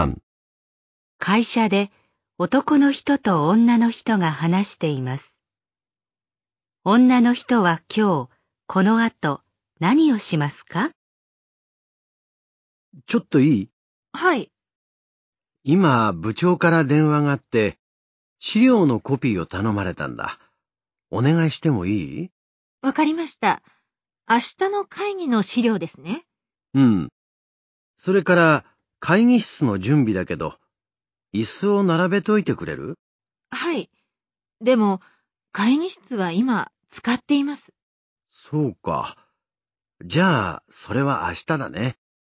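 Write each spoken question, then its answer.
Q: 女の人は今日、この後、何をしますか?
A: 資料のコピーをする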